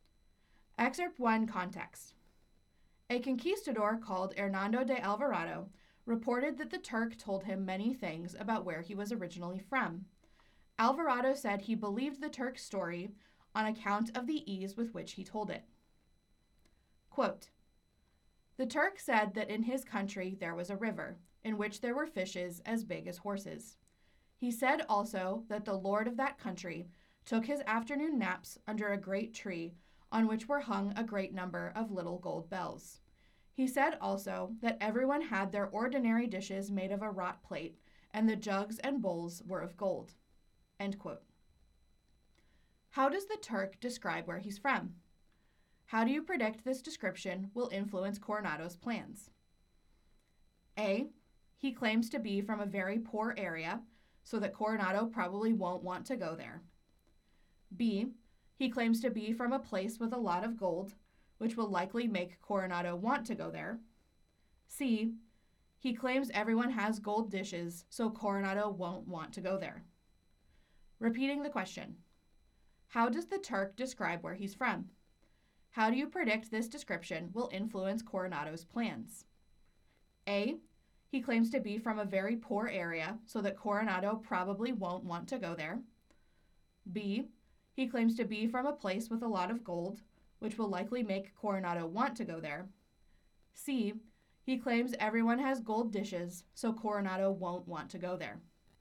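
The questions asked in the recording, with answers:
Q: How does the Turk describe where he's from?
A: B: He claims to be from a place with a lot of gold, which will likely make Coronado want to go there.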